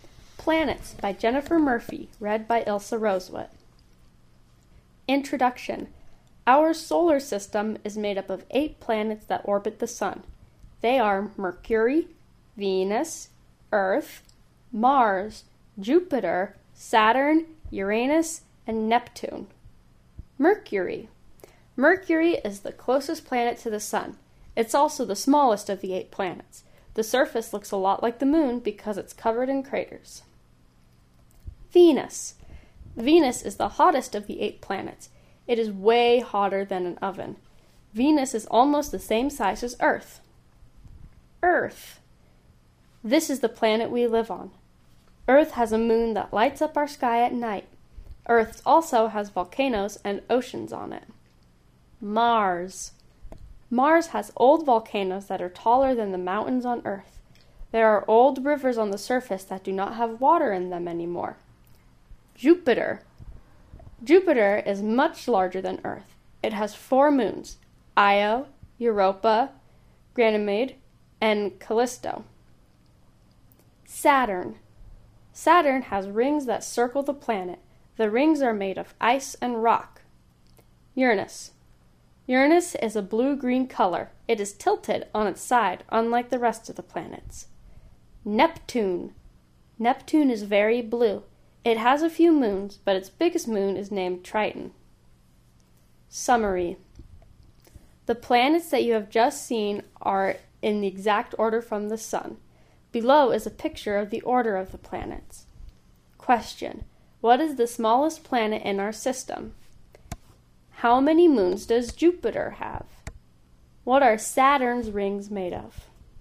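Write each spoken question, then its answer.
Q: What is the smallest planet in our system?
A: Mercury

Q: What are Saturn's rings made of?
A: Ice and rock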